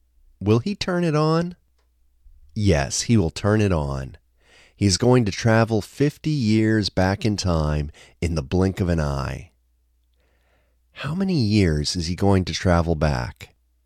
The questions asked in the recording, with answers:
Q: How many years is he going to travel back?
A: He is going to travel back 50 years.